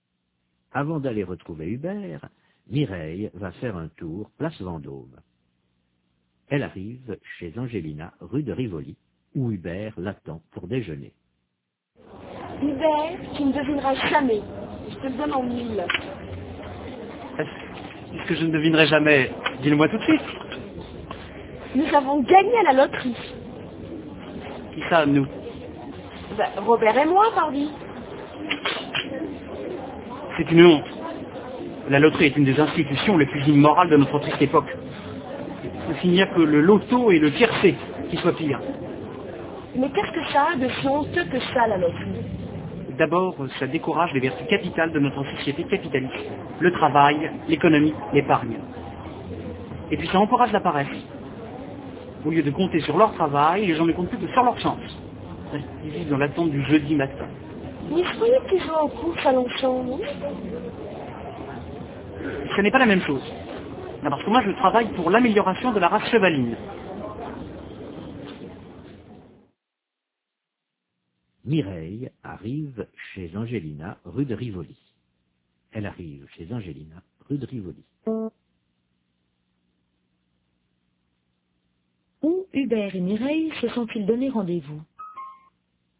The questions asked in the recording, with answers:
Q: Où Hubert et Mireille se sont-ils donné rendez-vous?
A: Chez Angelina, rue de Rivoli.